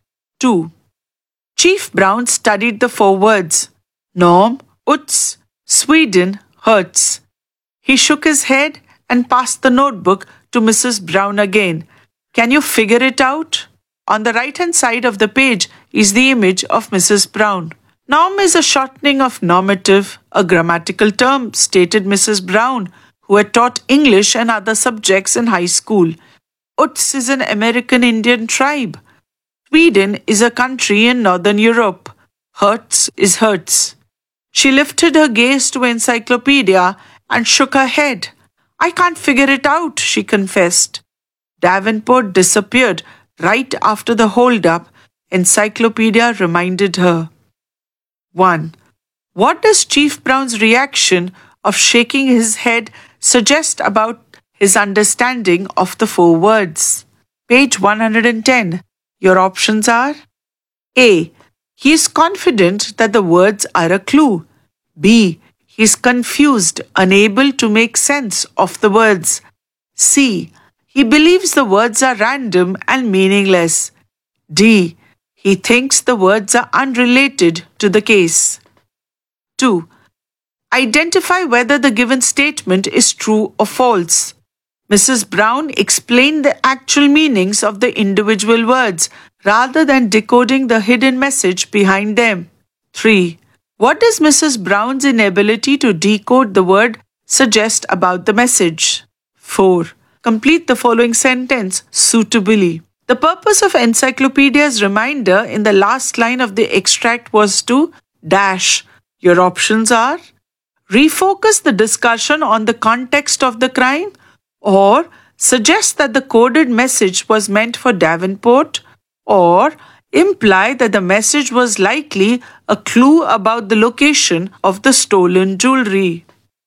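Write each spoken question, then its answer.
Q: What does Chief Brown's reaction of shaking his head suggest about his understanding of the four words?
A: B: He is confused, unable to make sense of the words.

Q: Mrs. Brown explained the actual meanings of the individual words rather than decoding the hidden message behind them.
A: True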